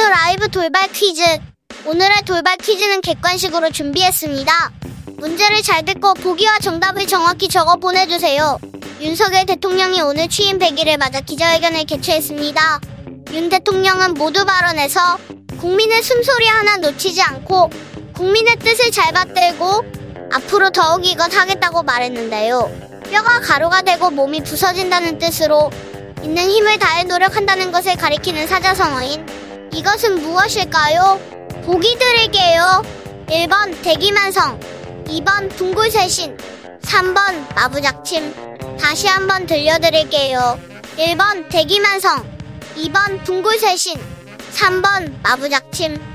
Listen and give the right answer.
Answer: 저부터 앞으로 더욱 분골쇄신하겠습니다.